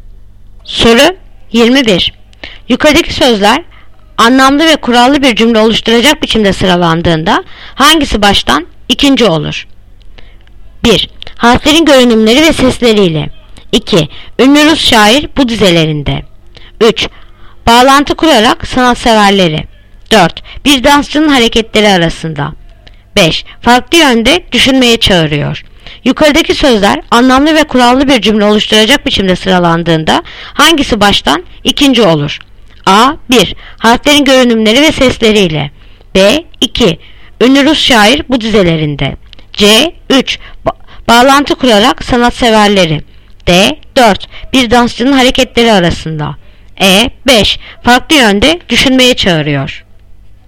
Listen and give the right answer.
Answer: Yanıt Adana. 1. Harflerin görünümleri ve sesleriyle.